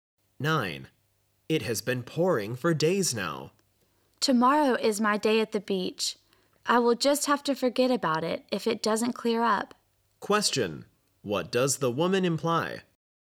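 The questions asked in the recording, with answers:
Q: What does the woman imply?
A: She may cancel her beach trip if the rain continues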